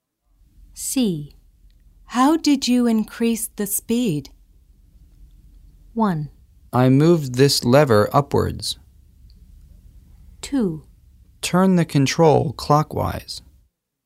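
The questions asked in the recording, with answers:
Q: How did you increase the speed?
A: 1: I moved this lever upwards.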